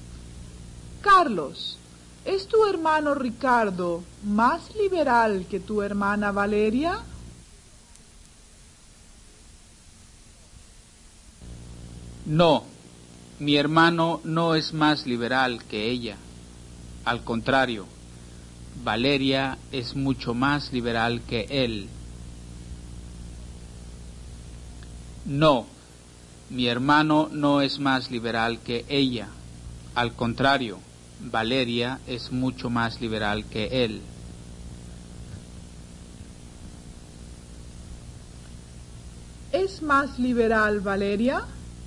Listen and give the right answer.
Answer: sí, Valeria es mucho más liberal que su hermano.